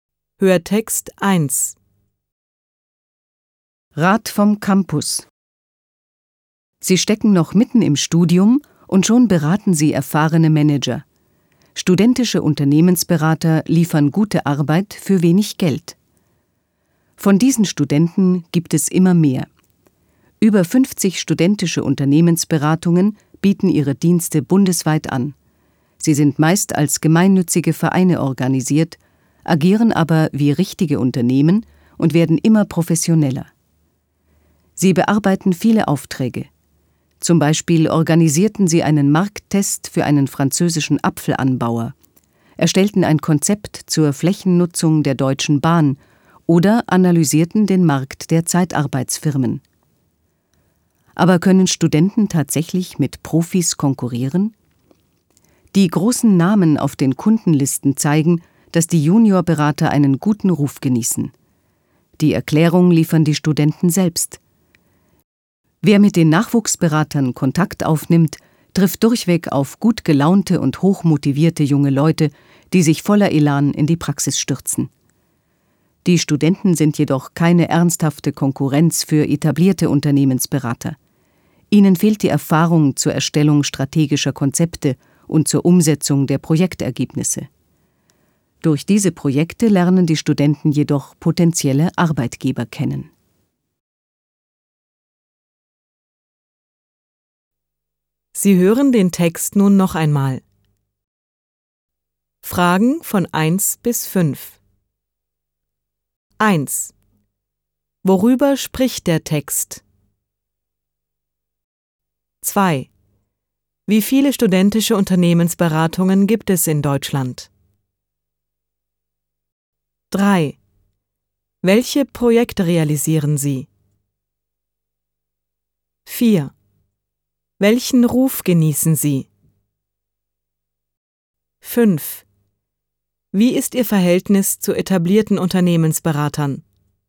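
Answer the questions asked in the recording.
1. Über studentische Unternehmensberater
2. Über 50
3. Z. B. einen Markttest für einen französischen Apfelanbauer, ein Flächennutzungskonzept für die Deutsche Bahn, eine Marktanalyse der Zeitarbeitsfirmen
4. Einen guten Ruf
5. Sie sind keine ernsthafte Konkurrenz für sie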